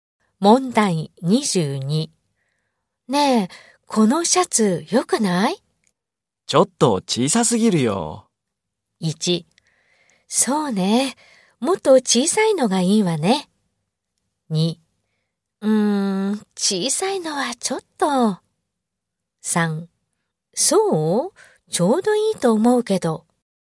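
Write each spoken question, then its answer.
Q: ねえ、このシャツよくない?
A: 2: そう?ちょうどいいと思うけど。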